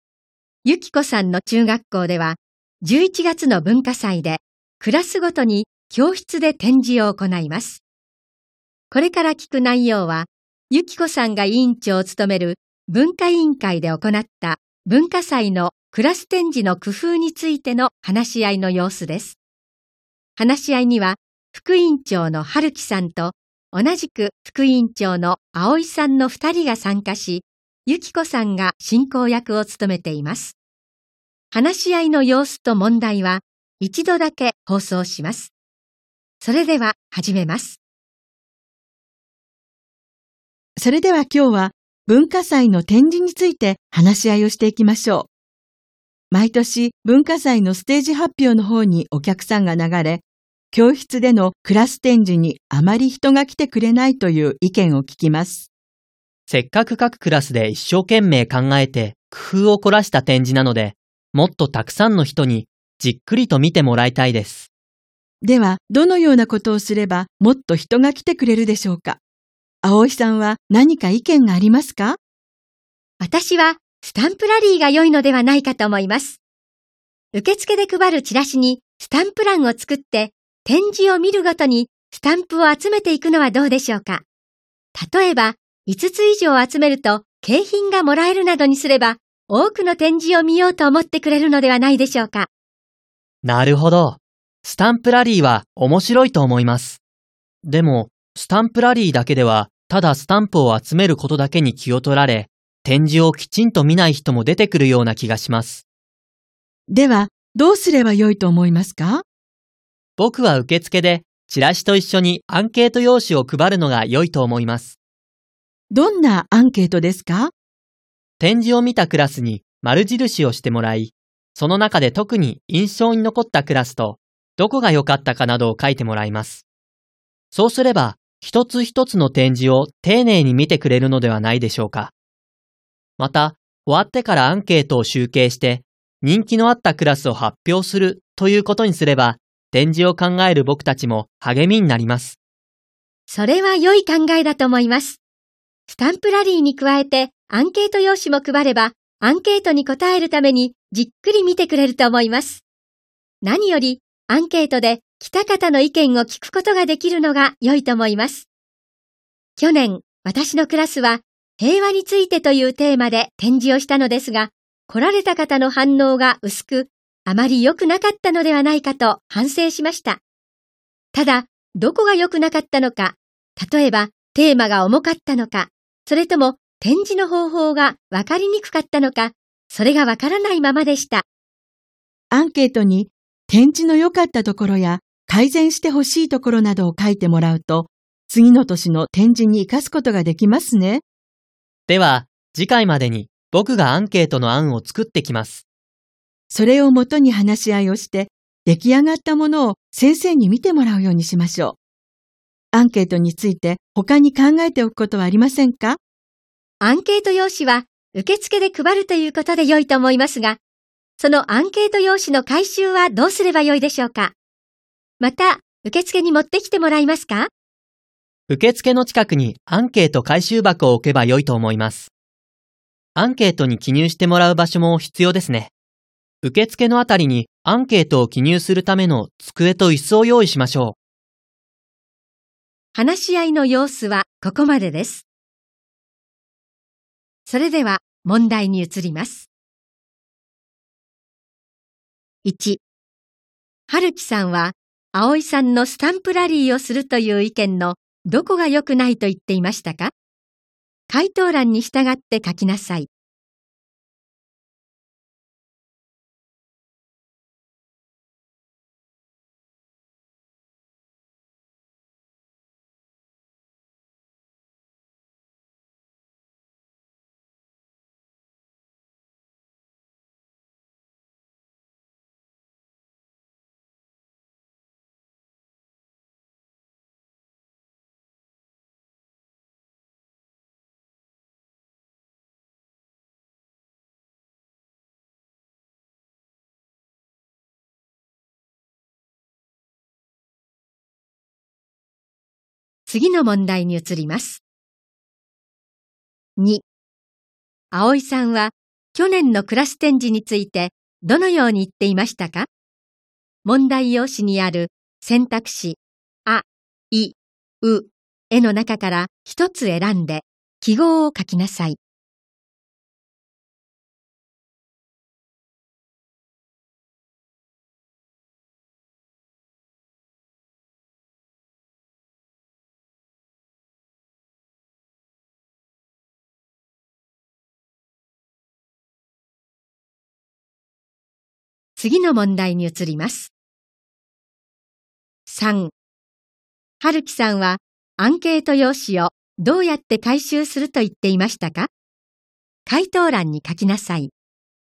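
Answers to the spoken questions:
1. スタンプを集めることだけに気を取られ、展示をきちんと見ない人が出てくるところ
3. 受付の近くにアンケート回収箱を置いて回収する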